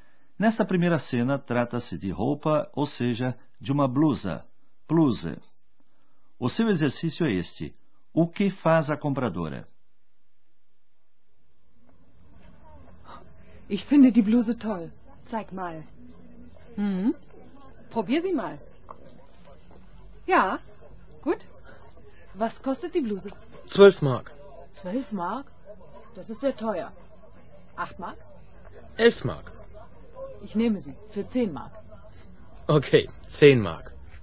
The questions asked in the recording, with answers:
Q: O que faz a compradora?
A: O comprador pechincha tentando obter um preço mais baixo.